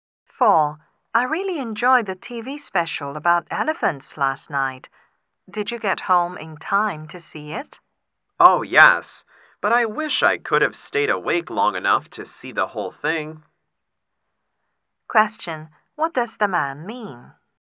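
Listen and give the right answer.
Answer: He fell asleep before the programme ended.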